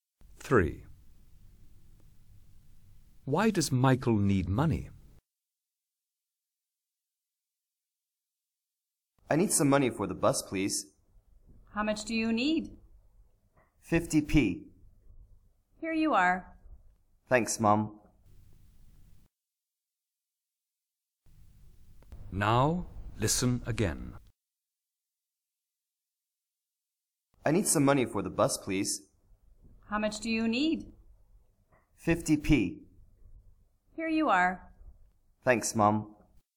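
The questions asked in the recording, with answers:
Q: Why does Michael need money?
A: For the bus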